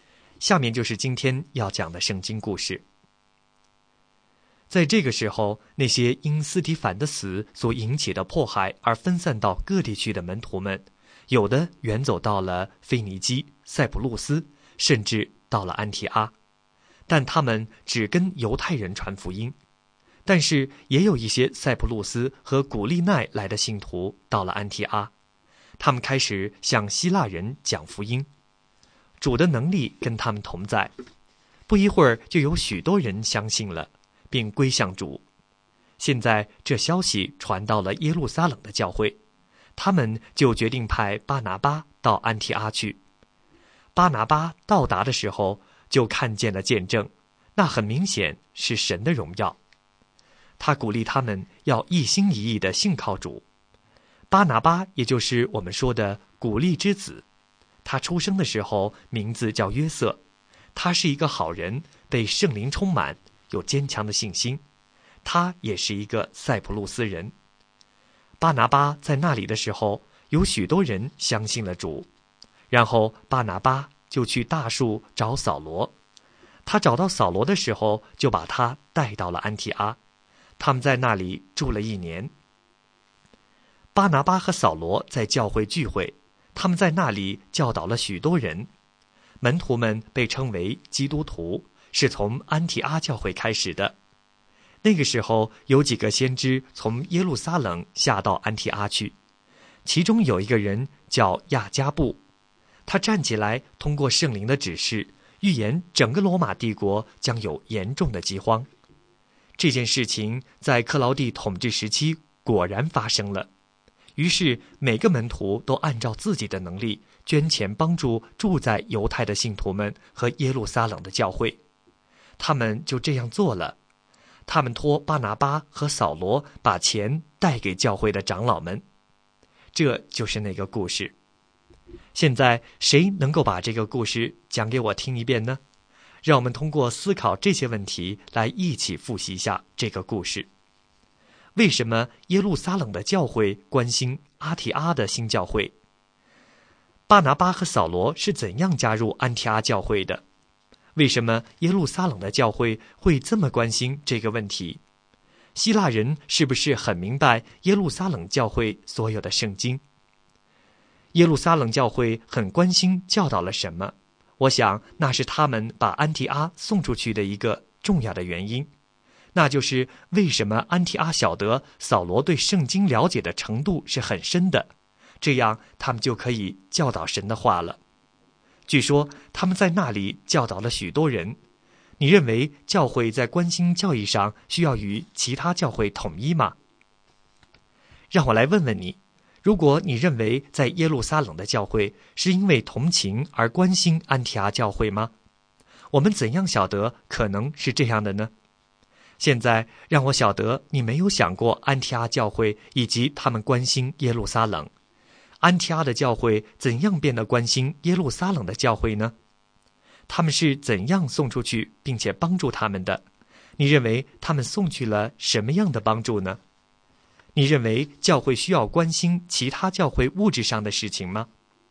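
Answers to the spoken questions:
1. 耶路撒冷教会派巴拿巴去安提阿,巴拿巴又去大树找到扫罗,把他带到安提阿
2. 先知亚加布预言将有大饥荒
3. 门徒按能力捐钱,托巴拿巴和扫罗带给长老们
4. 金钱(捐款)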